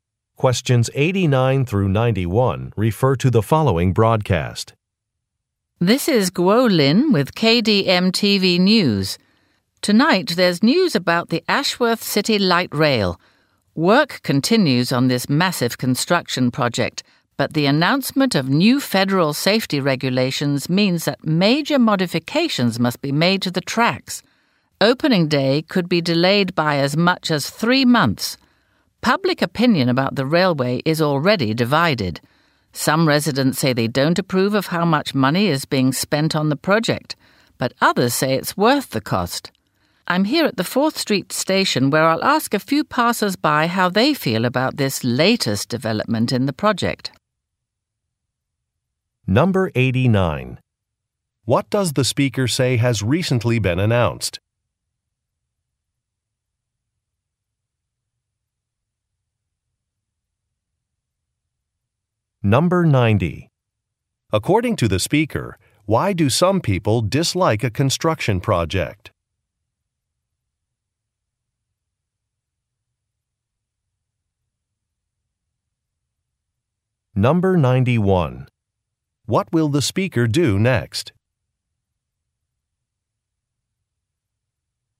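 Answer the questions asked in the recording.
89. New federal safety regulations
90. Too much money is being spent on it
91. Interview passers-by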